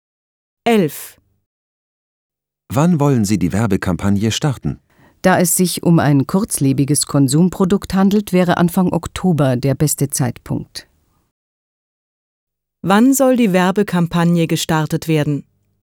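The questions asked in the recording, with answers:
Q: Wann soll die Werbekampagne gestartet werden?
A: Anfang Oktober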